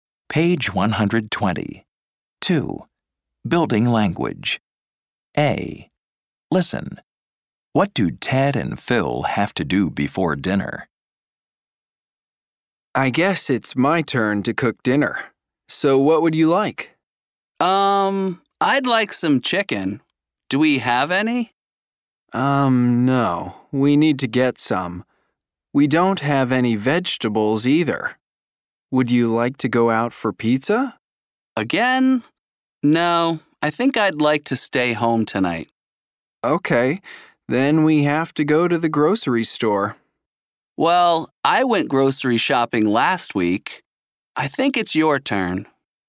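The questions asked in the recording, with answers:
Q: What do Ted and Phil have to do before dinner?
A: Go to the grocery store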